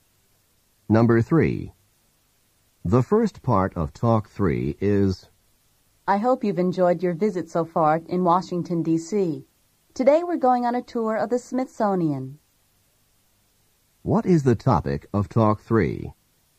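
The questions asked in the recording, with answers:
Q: What is the topic of Talk 3?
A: A tour of the Smithsonian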